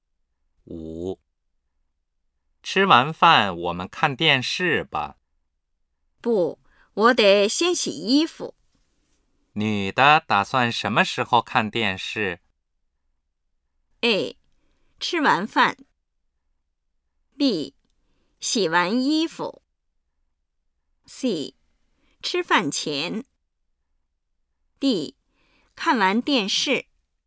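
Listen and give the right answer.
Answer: B: 洗完衣服。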